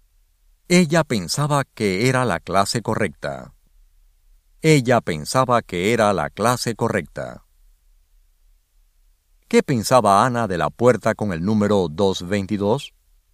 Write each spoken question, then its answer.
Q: ¿Qué pensaba Ana de la puerta con el número 222?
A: Ana pensaba que la puerta con el número 222 era la clase correcta.